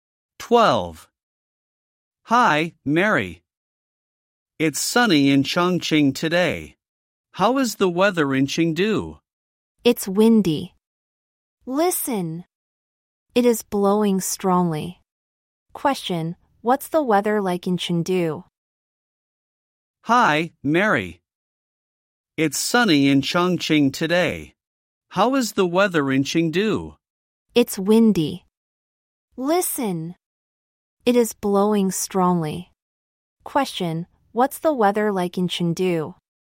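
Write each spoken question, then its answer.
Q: Question,What's the weather like in Chengdu?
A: Windy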